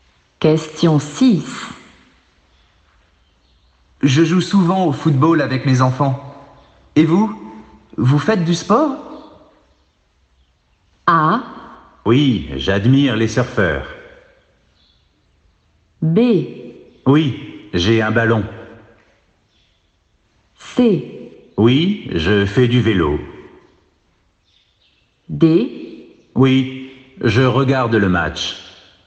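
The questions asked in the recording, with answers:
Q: Et vous? Vous faites du sport?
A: C: Oui, je fais du vélo.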